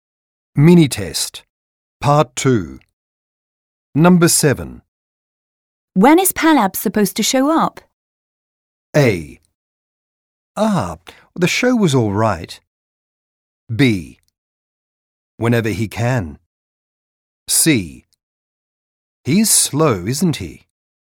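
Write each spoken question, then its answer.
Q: When is Palab supposed to show up?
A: B: Whenever he can.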